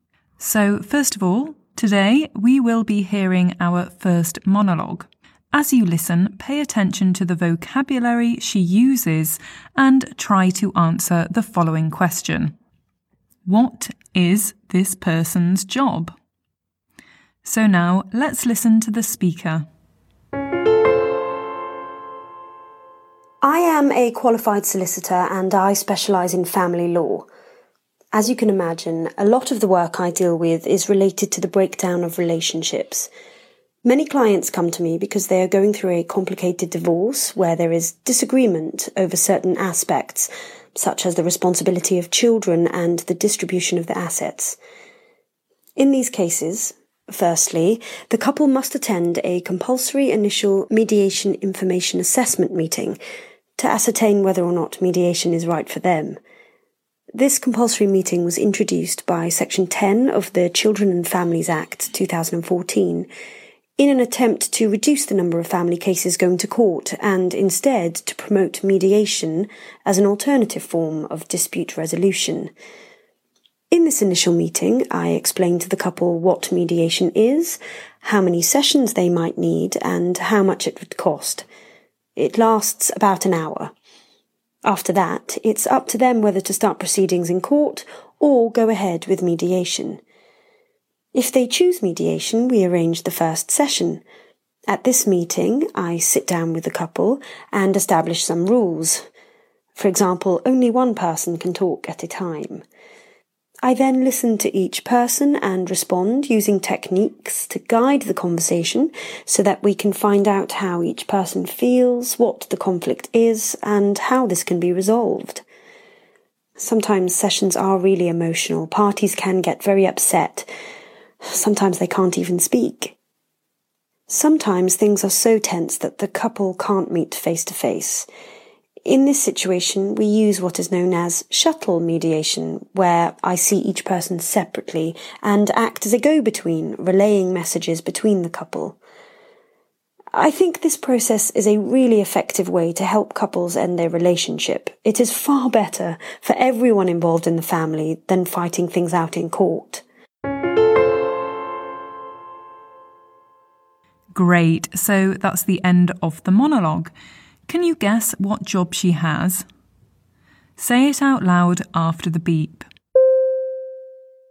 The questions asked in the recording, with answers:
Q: What is this person's job?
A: Of course, she's a mediator.